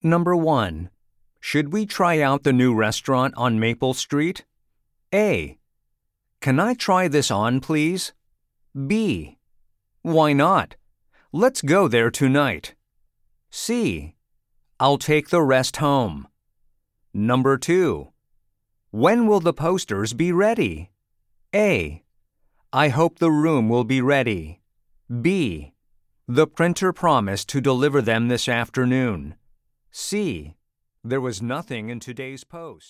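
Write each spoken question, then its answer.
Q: Should we try out the new restaurant on Maple Street?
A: B: Why not? Let's go there tonight.

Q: When will the posters be ready?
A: B: The printer promised to deliver them this afternoon.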